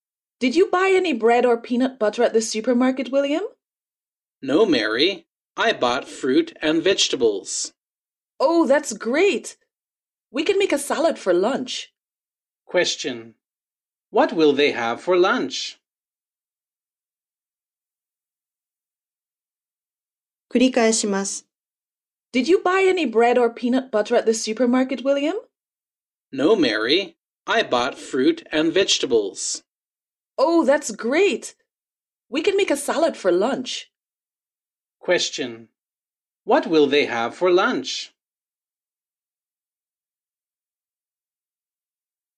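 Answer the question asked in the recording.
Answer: A salad.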